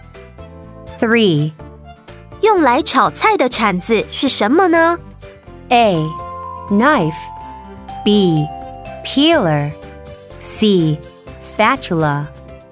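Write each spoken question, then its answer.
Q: 用来炒菜的铲子是什么呢?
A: C: Spatula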